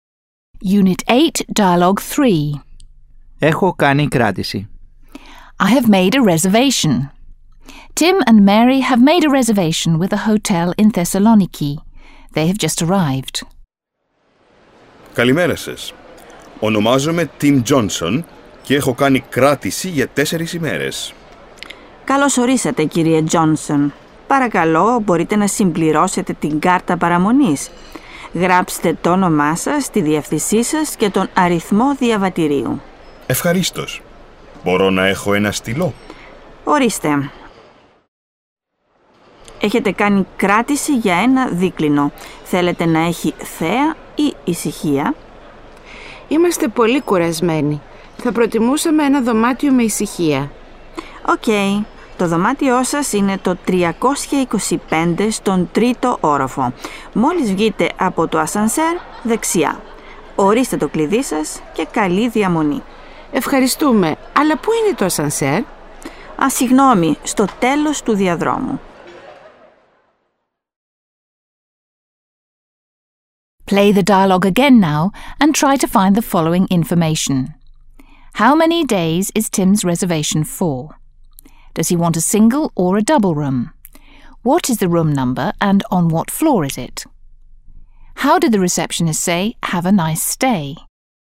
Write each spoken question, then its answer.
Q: How many days is Tim's reservation for?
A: Tim's reservation is for 4 days.

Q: Does he want a single or a double room?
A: He would like a double room.

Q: What is the room number and on what floor is it?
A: The room number is 325 on the third floor.

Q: How did the receptionist say, "Have a nice stay"?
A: Καλή διαμονή